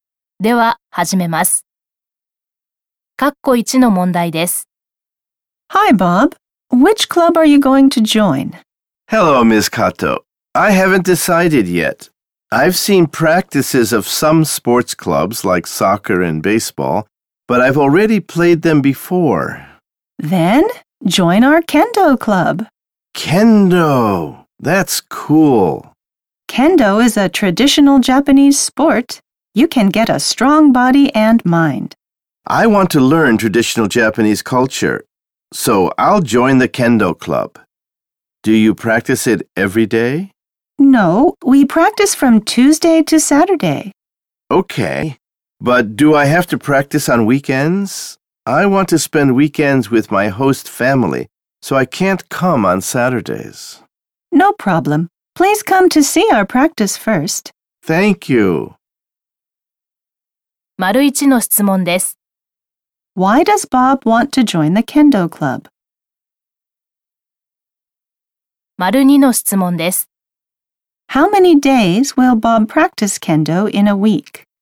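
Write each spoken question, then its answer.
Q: Why does Bob want to join the kendo club?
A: Because he wants to learn traditional Japanese culture

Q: How many days will Bob practice kendo in a week?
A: Four days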